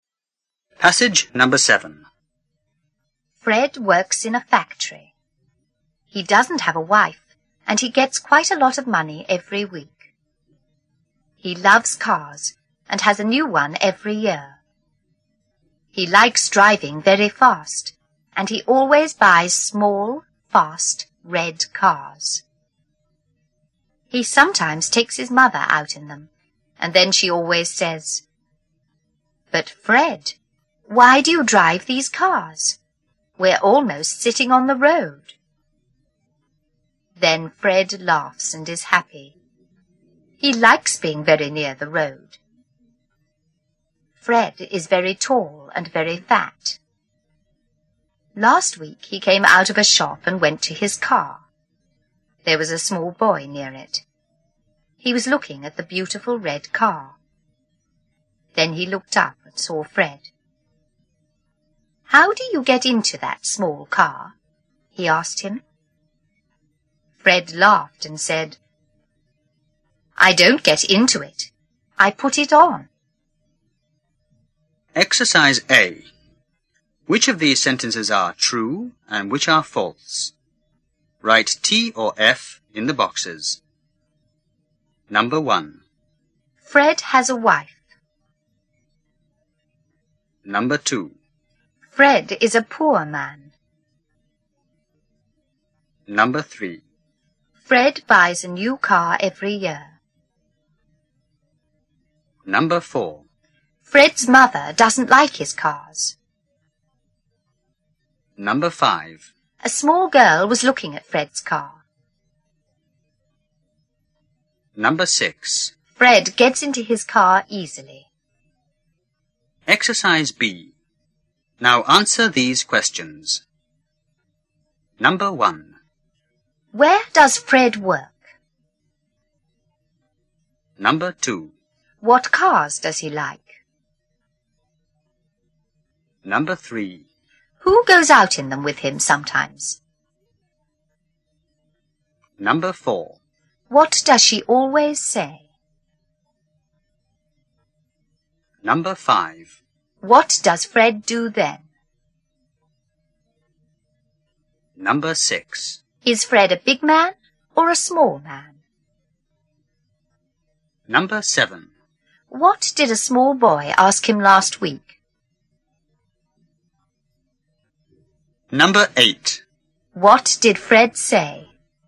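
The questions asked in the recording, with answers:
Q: Fred has a wife.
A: False

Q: Fred is a poor man.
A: False

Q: Fred buys a new car every year.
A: True

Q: Fred's mother doesn't like his cars.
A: True

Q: A small girl was looking at Fred's car.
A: False

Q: Fred gets into his car easily.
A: False

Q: Where does Fred work?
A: In a factory

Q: What cars does he like?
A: Small, fast, red cars

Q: Who goes out in them with him sometimes?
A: His mother

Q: What does she always say?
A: "But Fred, why do you drive these cars? We're almost sitting on the road."

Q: What does Fred do then?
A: He laughs and is happy

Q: Is Fred a big man or a small man?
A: A big man

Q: What did a small boy ask him last week?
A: How do you get into that small car?

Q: What did Fred say?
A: I don't get into it. I put it on.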